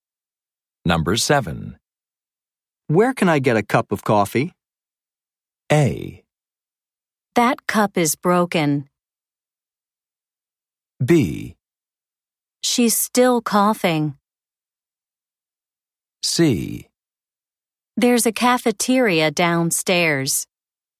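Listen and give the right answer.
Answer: C: There's a cafeteria downstairs.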